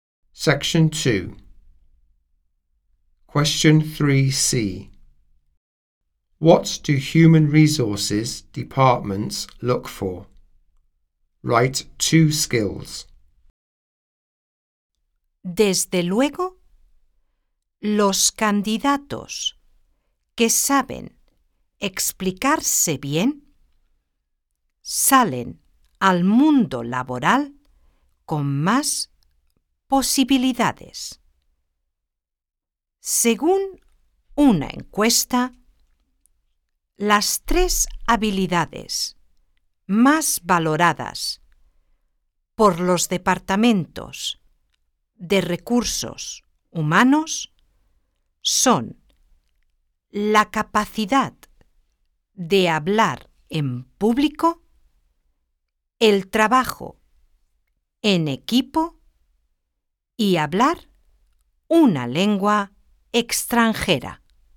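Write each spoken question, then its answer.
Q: What do human resources departments look for?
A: Public speaking, teamwork, speaking a foreign language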